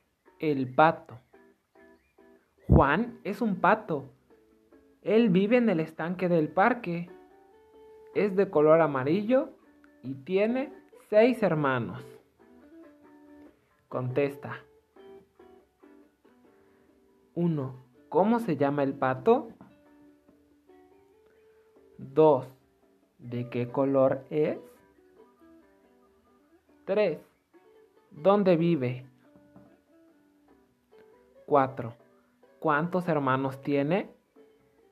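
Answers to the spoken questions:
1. Juan
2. amarillo
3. en el estanque del parque
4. seis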